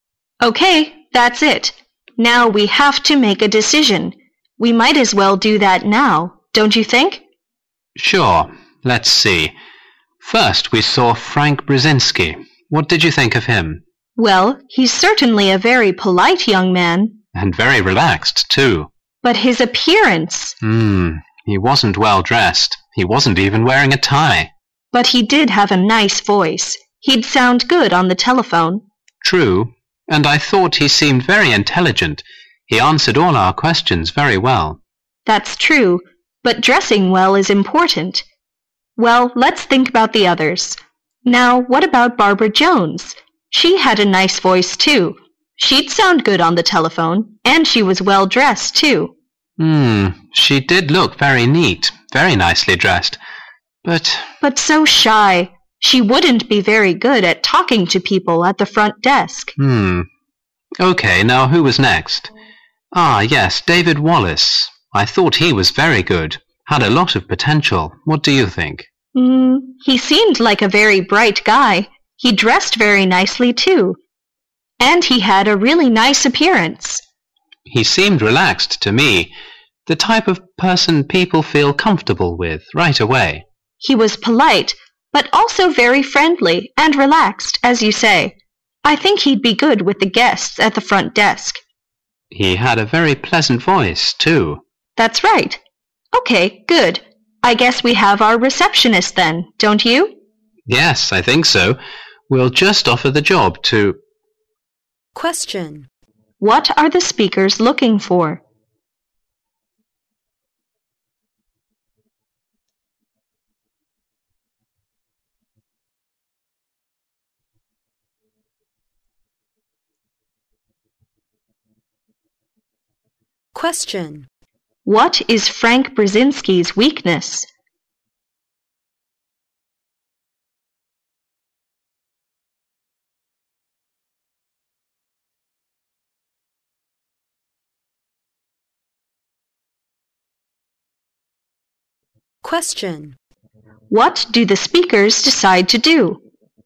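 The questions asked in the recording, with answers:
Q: What are the speakers looking for?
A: A receptionist

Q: What is Frank Brzezinski's weakness?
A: He wasn't well dressed

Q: What do the speakers decide to do?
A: Offer the receptionist job to David Wallace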